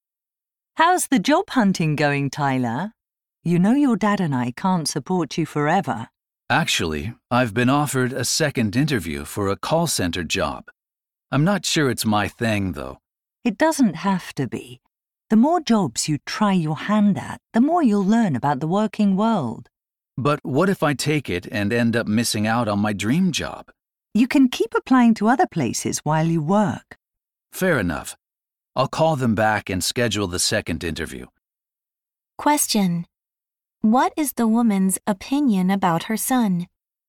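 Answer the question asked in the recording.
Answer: He should take the call center job to gain work experience while still applying elsewhere.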